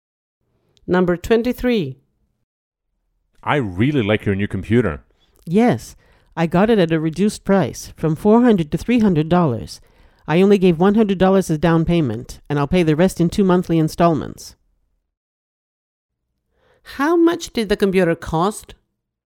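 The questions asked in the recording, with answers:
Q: How much did the computer cost?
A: $300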